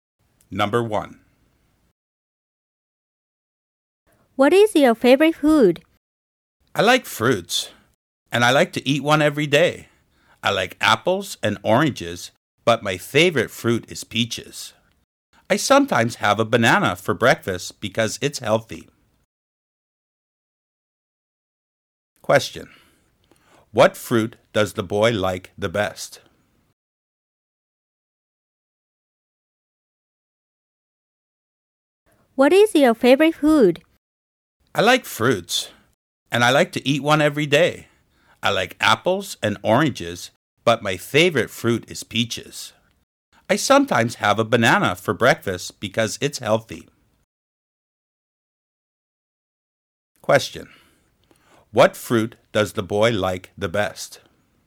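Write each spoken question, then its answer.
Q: What fruit does the boy like the best?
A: Peaches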